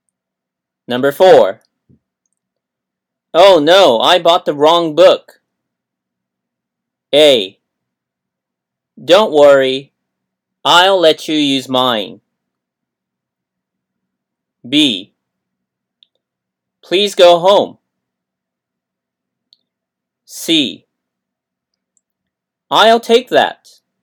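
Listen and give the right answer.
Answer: A: Don't worry. I'll let you use mine.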